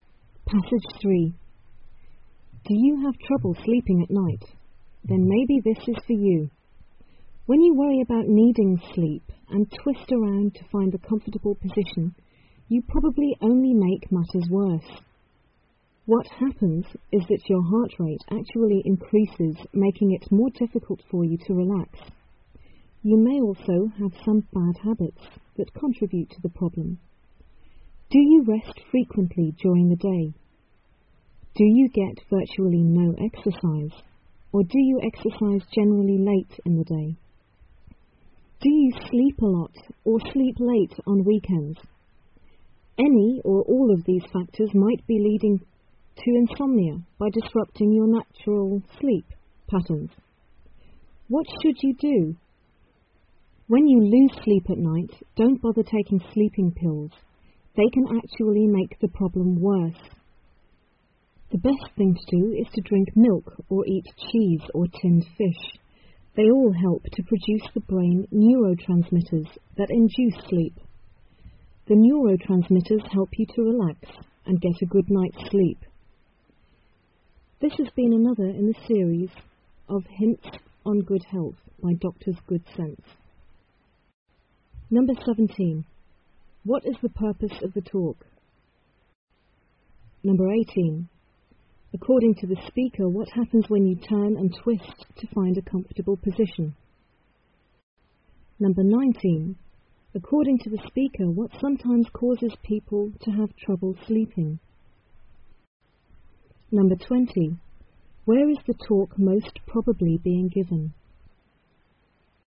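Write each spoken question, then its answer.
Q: What is the purpose of the talk?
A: To give advice on how to sleep well

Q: According to the speaker, what happens when you turn and twist to find a comfortable position?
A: Your heart rate increases

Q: According to the speaker, what sometimes causes people to have trouble sleeping?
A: Bad habits, such as resting often during the day or getting no exercise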